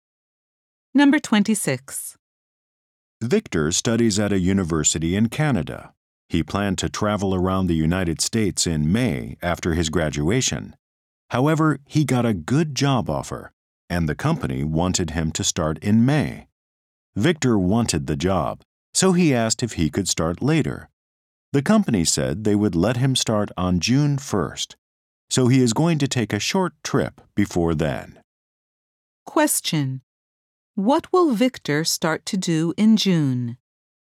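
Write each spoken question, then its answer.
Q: What will Victor start to do in June?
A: Start his new job.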